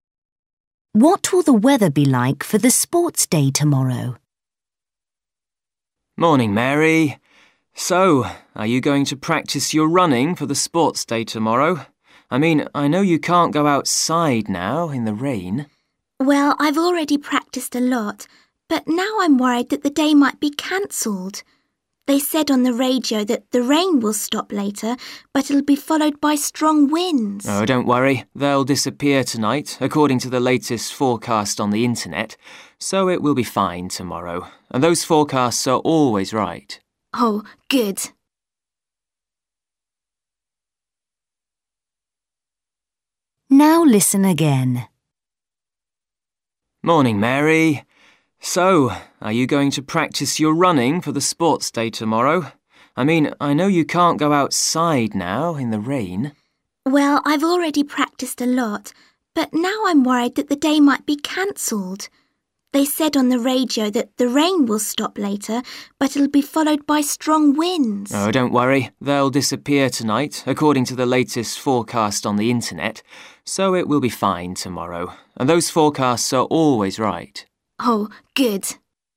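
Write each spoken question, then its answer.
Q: What will the weather be like for the sports day tomorrow?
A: fine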